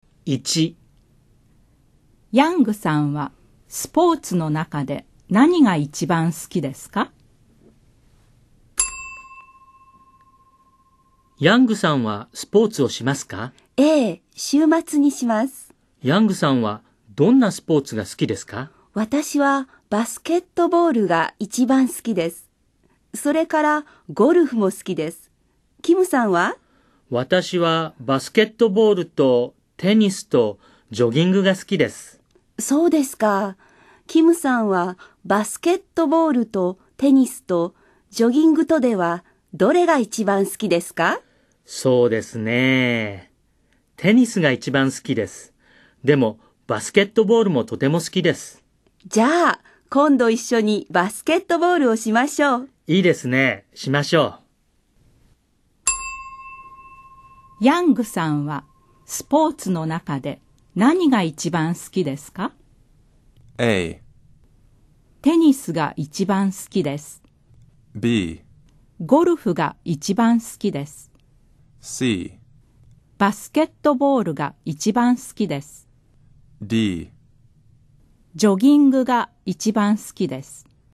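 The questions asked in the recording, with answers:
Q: ヤングさんはスポーツの中で何が一番好きですか?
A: C: バスケットボールが一番好きです。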